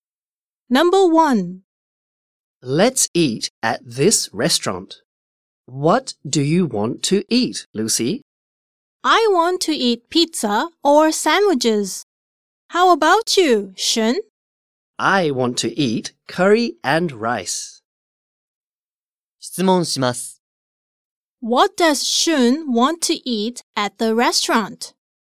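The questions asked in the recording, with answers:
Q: What does Shun want to eat at the restaurant?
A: Curry and rice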